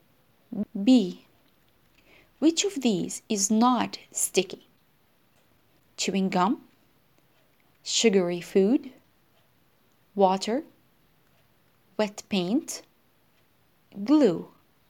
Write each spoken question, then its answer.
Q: Which of these is not sticky?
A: The answer is water.